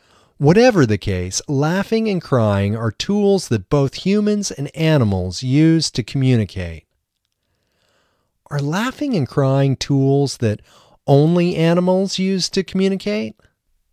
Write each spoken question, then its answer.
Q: Are laughing and crying tools that only animals use to communicate?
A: No, laughing and crying are not tools that only animals use to communicate.